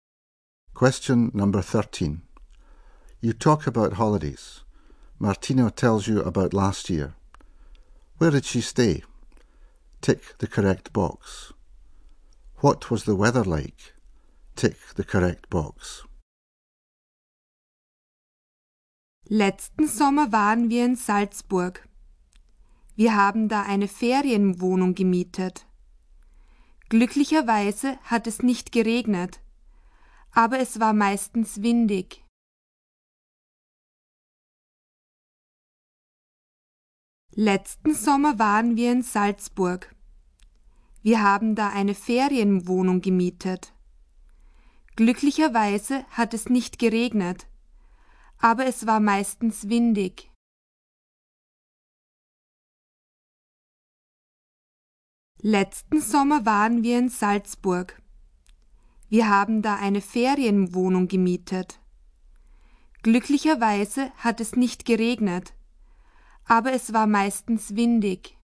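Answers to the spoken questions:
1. In a rented holiday flat in Salzburg
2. Mostly windy (no rain)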